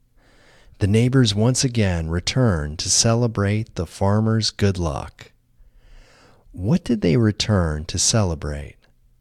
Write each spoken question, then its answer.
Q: What did they return to celebrate?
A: They returned to celebrate the farmer's good luck.